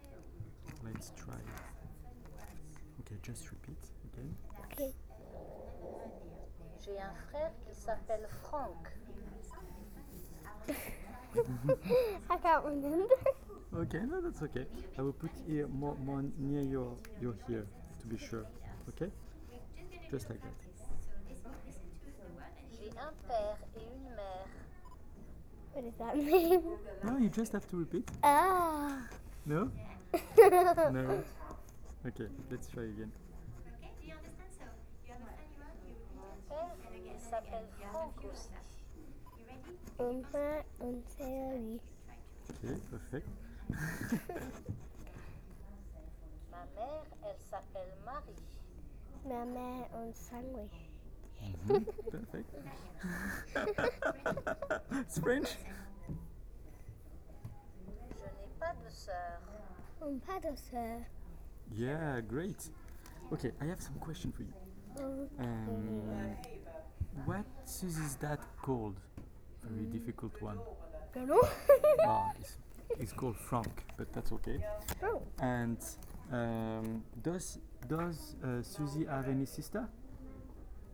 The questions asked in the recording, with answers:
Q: And does Susie have any sister?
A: No, she doesn't.